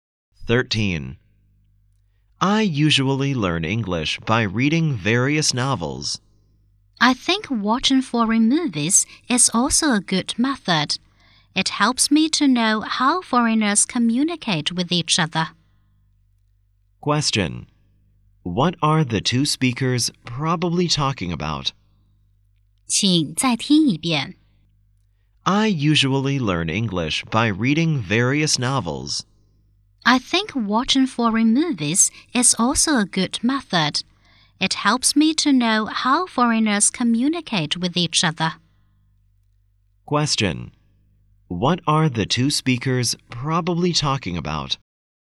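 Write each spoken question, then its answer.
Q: What are the two speakers probably talking about?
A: Ways of learning English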